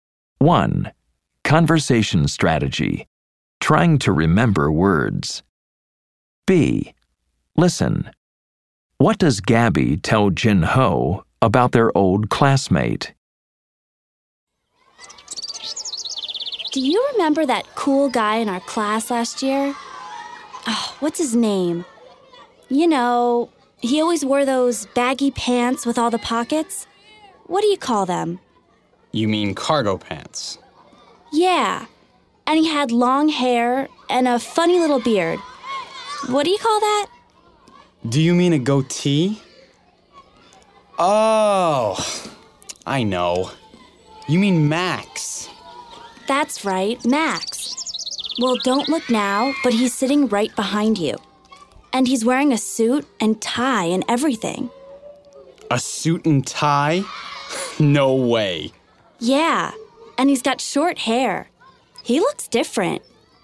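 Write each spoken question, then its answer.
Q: What does Gabby tell Jin Ho about their old classmate?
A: Max is sitting right behind him, wearing a suit and tie, and he has short hair now and looks different.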